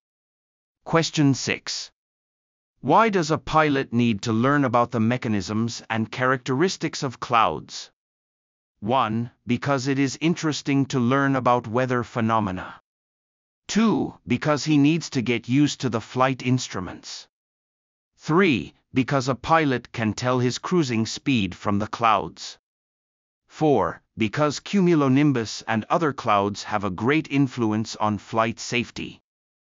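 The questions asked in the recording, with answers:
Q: Why does a pilot need to learn about the mechanisms and characteristics of clouds?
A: 4: Because cumulonimbus and other clouds have a great influence on flight safety.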